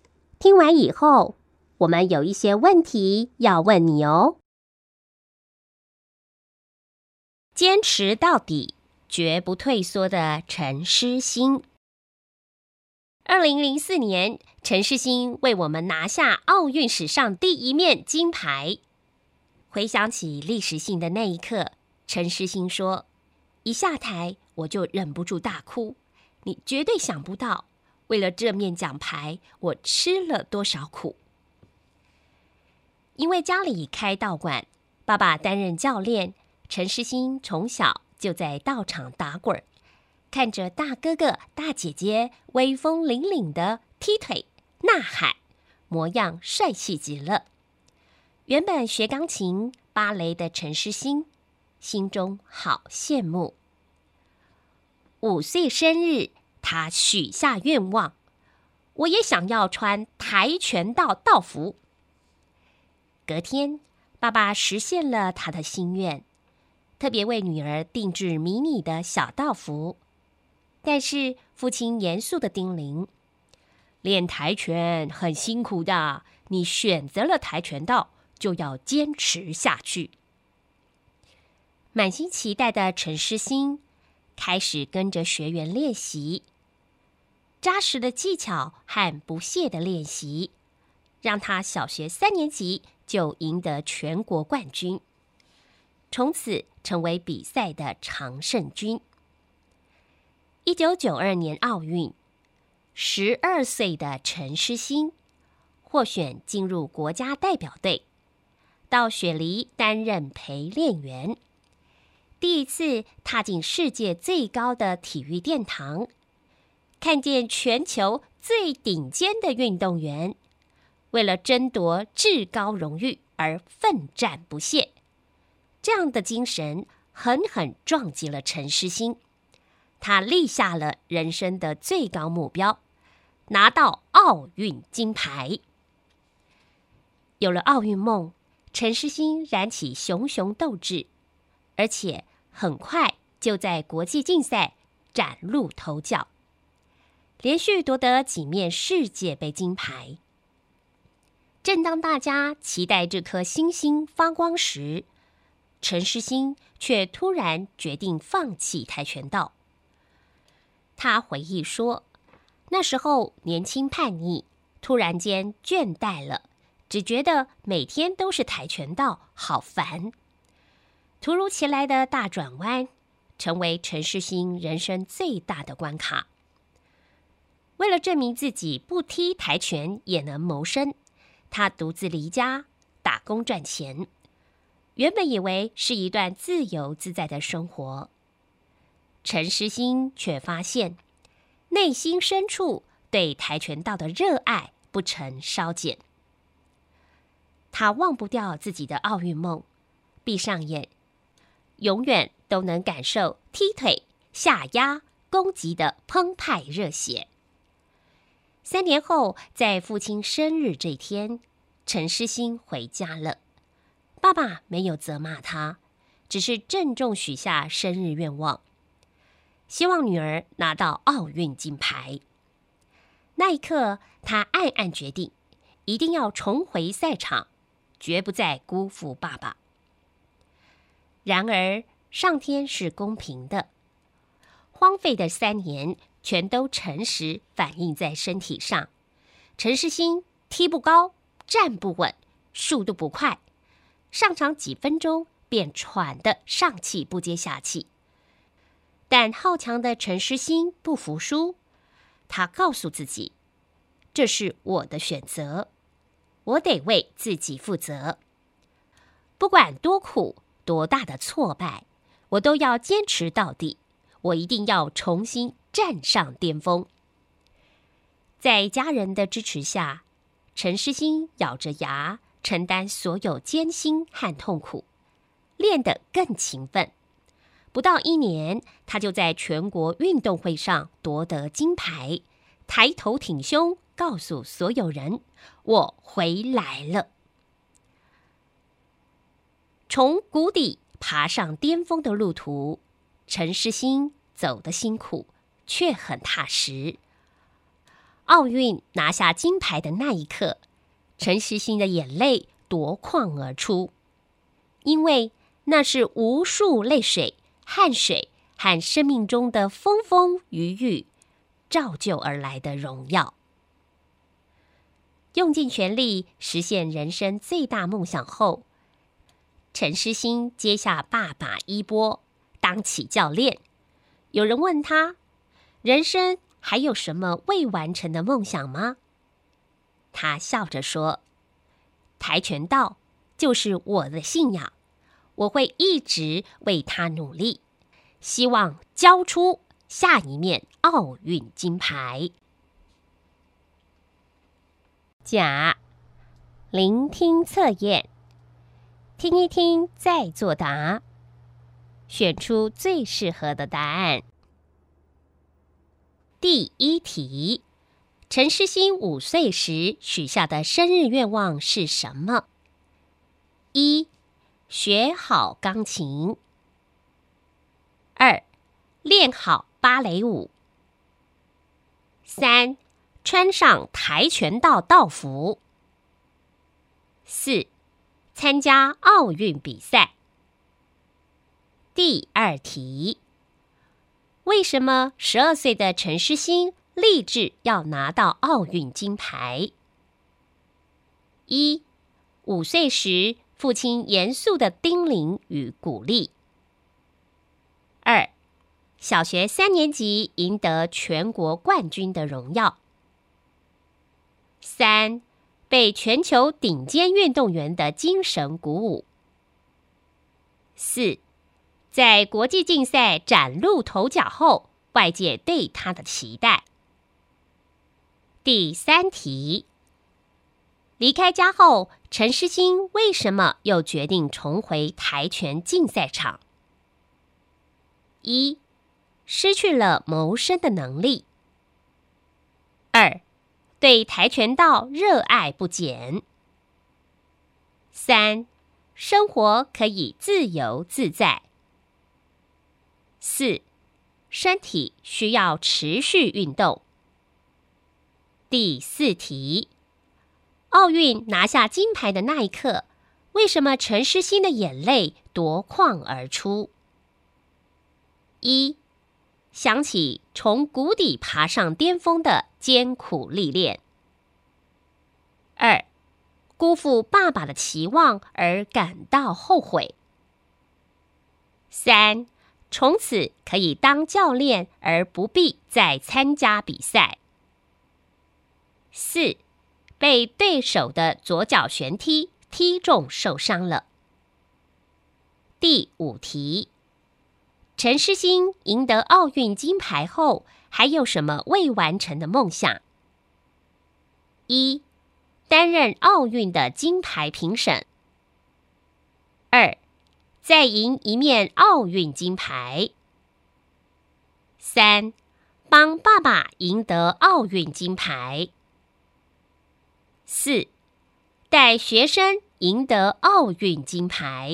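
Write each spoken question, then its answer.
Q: 陈诗欣五岁时许下的生日愿望是什么?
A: 三: 穿上跆拳道道服

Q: 为什么十二岁的陈诗欣立志要拿到奥运金牌?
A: 三: 被全球顶尖运动员的精神鼓舞

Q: 离开家后,陈诗欣为什么又决定重回跆拳竞赛场?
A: 二: 对跆拳道热爱不减

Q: 奥运拿下金牌的那一刻,为什么陈诗欣的眼泪夺眶而出?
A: 一: 想起从谷底爬上巅峰的艰苦历练

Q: 陈诗欣赢得奥运金牌后还有什么未完成的梦想?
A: 四: 带学生赢得奥运金牌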